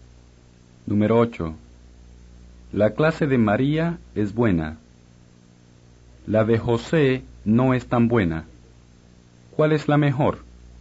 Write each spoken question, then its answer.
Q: ¿Cuál es la mejor?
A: La clase de María. O, la de María es la mejor.